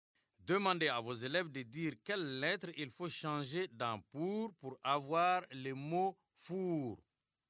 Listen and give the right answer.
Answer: Monsieur, j'efface le P et j'écris un F.